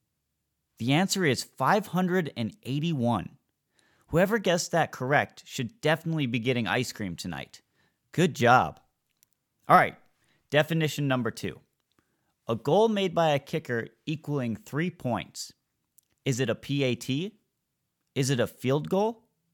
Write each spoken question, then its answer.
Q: A goal made by a kicker equaling 3 points.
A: If you answered field goal, you are 100% correct.